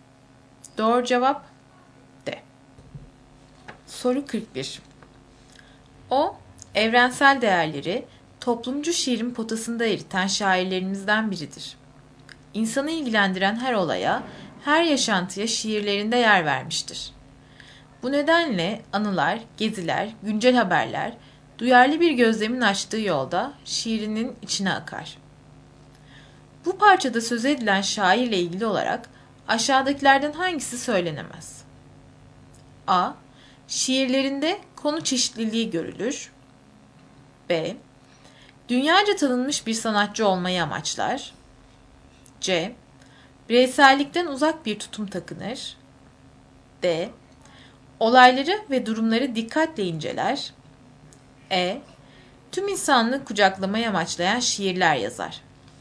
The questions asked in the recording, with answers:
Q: Bu parçada söz edilen şairle ilgili olarak aşağıdakilerden hangisi söylenemez?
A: Doğru cevap B.